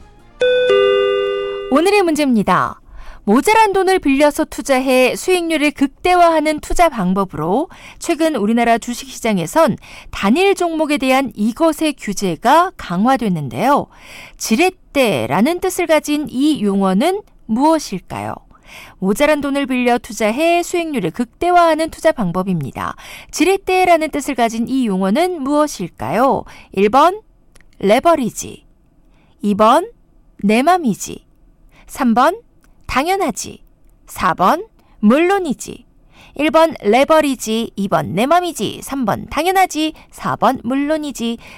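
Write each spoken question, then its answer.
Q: 지렛대라는 뜻을 가진 이 용어는 무엇일까요?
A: 1: 레버리지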